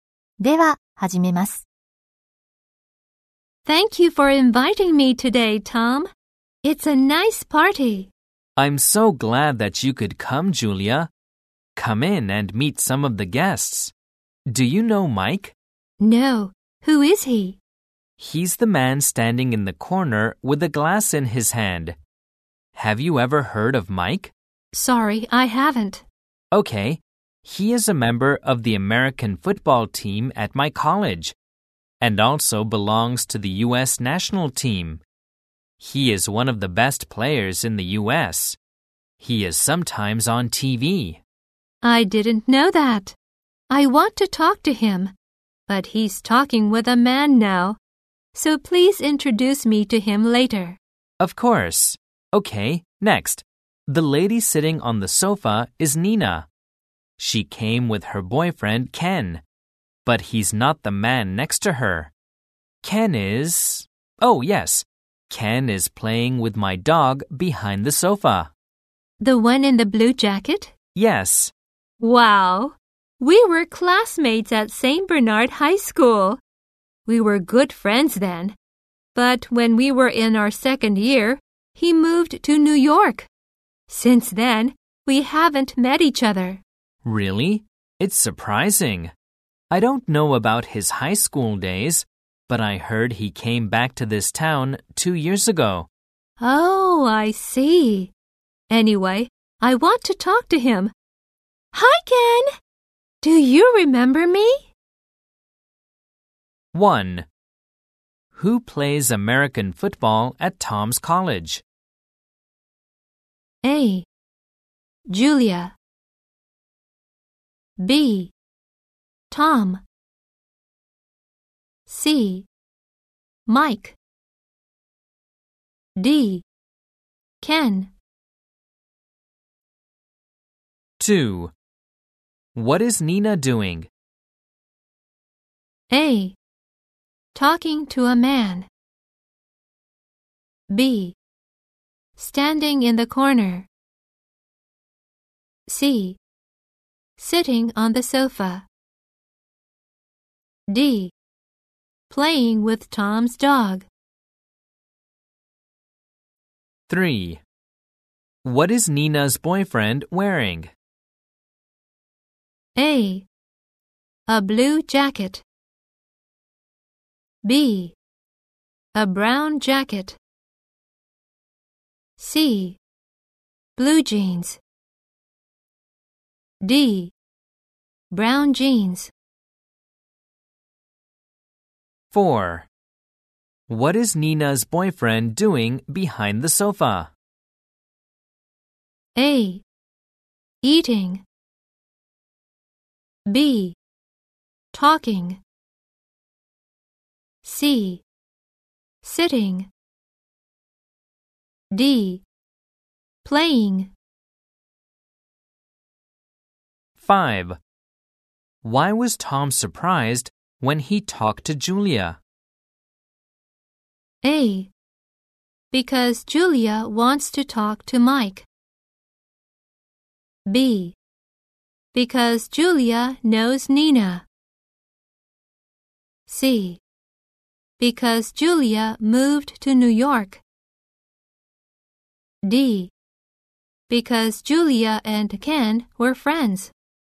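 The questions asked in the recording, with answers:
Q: Who plays American football at Tom's college?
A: C: Mike.

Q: What is Nina doing?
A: C: Sitting on the sofa.

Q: What is Nina's boyfriend wearing?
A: A: A blue jacket.

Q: What is Nina's boyfriend doing behind the sofa?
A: D: Playing.

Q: Why was Tom surprised?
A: D: Because Julia and Ken were friends.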